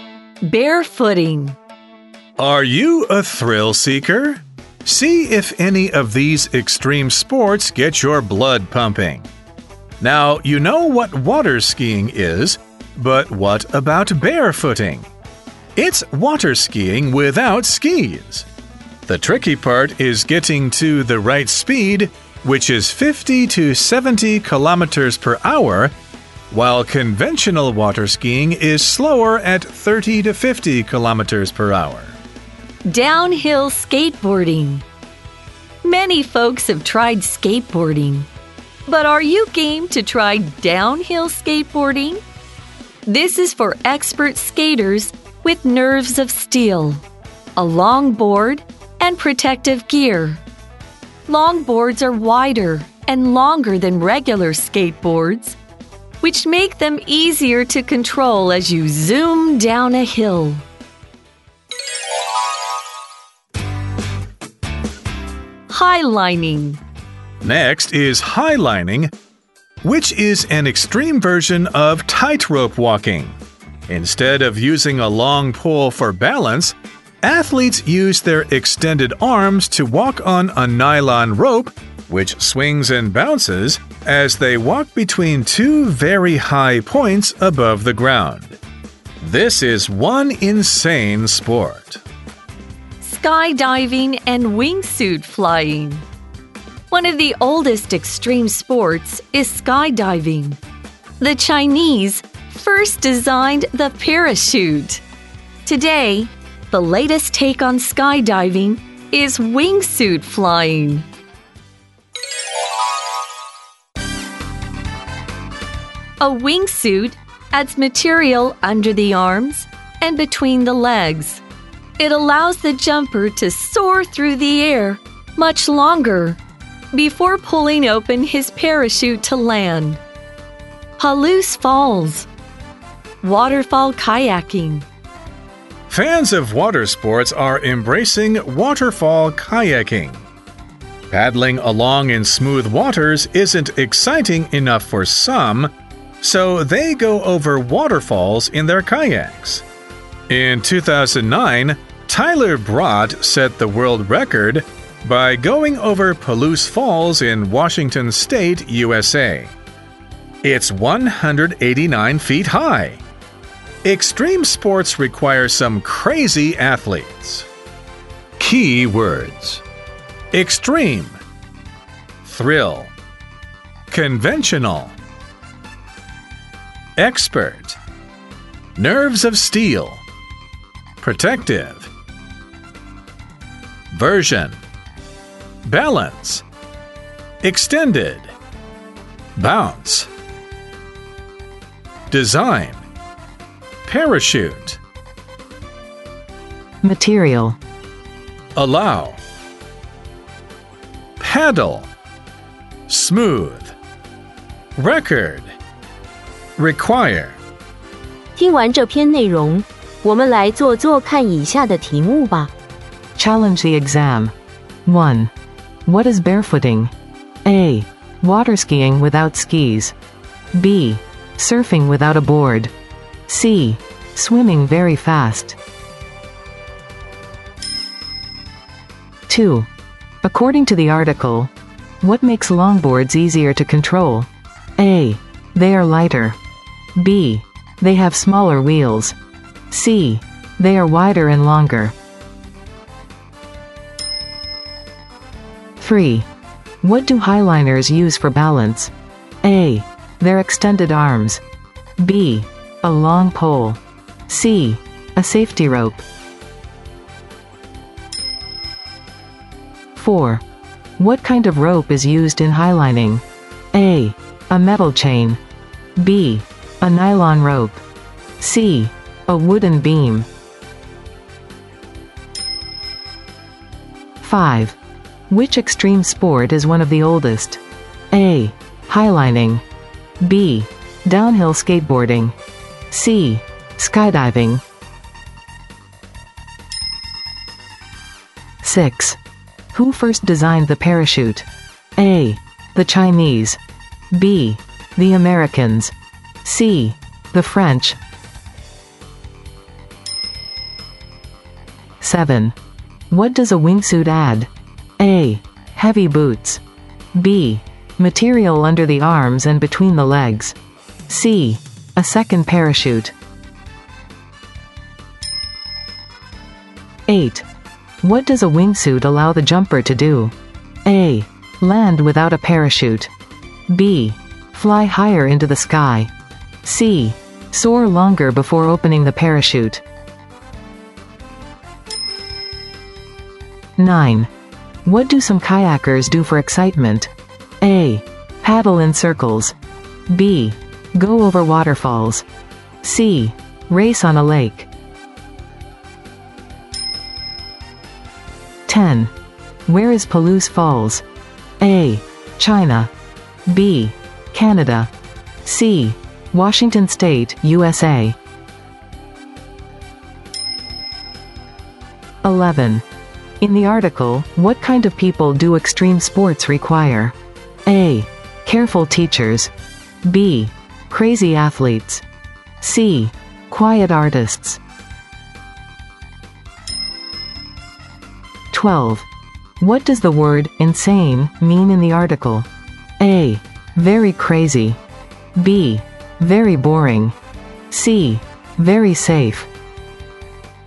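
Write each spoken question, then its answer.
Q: What is barefooting?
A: A: Water skiing without skis.

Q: According to the article, what makes longboards easier to control?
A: C: They are wider and longer.

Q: What do highliners use for balance?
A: A: Their extended arms.

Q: What kind of rope is used in highlining?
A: B: A nylon rope.

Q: Which extreme sport is one of the oldest?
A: C: Skydiving.

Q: Who first designed the parachute?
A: A: The Chinese.

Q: What does a wingsuit add?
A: B: Material under the arms and between the legs.

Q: What does a wingsuit allow the jumper to do?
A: C: Soar longer before opening the parachute.

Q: What do some kayakers do for excitement?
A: B: Go over waterfalls.

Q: Where is Palouse Falls?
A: C: Washington State, USA.

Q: In the article, what kind of people do extreme sports require?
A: B: Crazy athletes.

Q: What does the word insane mean in the article?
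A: A: Very crazy.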